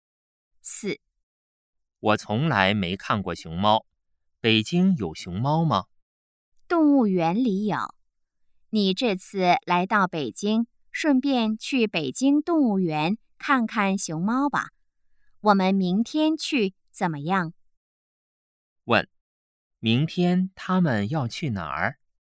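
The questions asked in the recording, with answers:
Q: 问,明天他们要去哪儿?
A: 北京动物园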